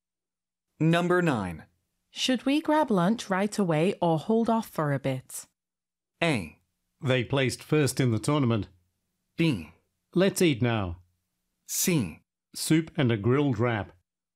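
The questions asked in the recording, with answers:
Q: Should we grab lunch right away or hold off for a bit?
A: B: Let's eat now.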